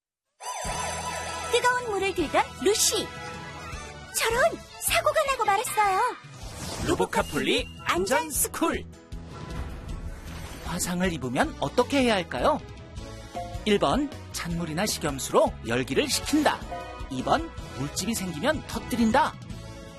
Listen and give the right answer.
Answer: 정답은 1번. 찬물이나 식염수로 열기를 식히고 깨끗한 거즈로 상처 부위를 감싸줘요.